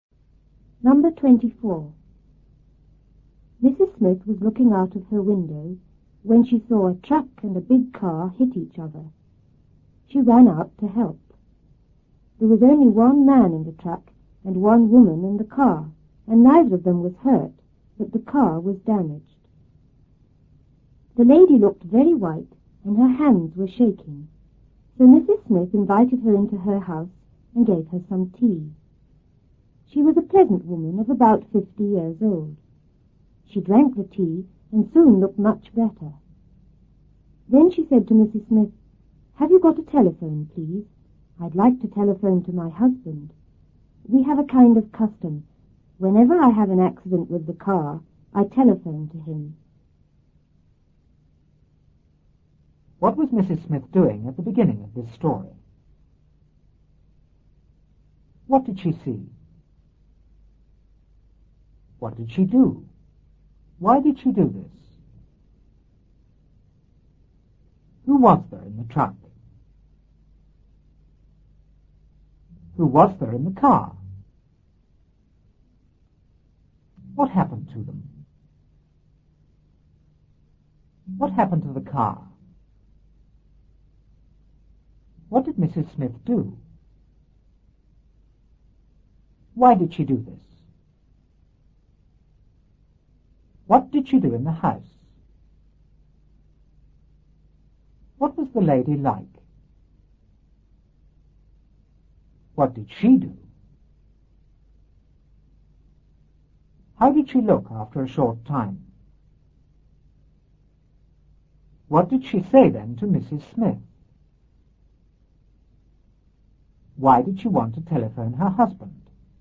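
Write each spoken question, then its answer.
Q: What was Mrs. Smith doing at the beginning of this story?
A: Looking out of her window

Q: What did she see?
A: A truck and a big car hit each other

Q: What did she do?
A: She ran out to help

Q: Who was there in the truck?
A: Only one man

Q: Who was there in the car?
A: One woman

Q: What happened to them?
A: Neither of them was hurt

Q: What happened to the car?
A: It was damaged

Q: What did Mrs. Smith do?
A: She invited the lady into her house

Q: Why did she do this?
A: The lady looked very white and her hands were shaking

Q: What did she do in the house?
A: Gave her some tea

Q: What was the lady like?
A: A pleasant woman of about 50

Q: What did she do?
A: She drank the tea

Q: How did she look after a short time?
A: Much better

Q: Why did she want to telephone her husband?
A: It was their custom to phone him whenever she had a car accident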